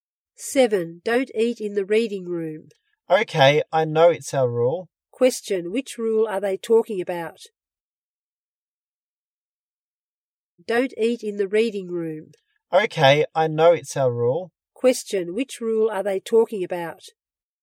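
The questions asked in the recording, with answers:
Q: Which rule are they talking about?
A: Don't eat in the reading room.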